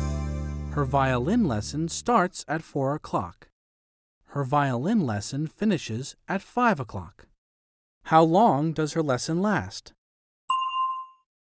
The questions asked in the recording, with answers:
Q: How long does her lesson last?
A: An hour. It lasts an hour.